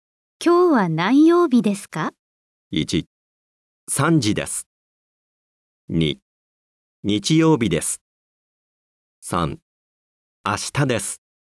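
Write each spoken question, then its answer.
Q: 今日は何曜日ですか?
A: 2: 日曜日です。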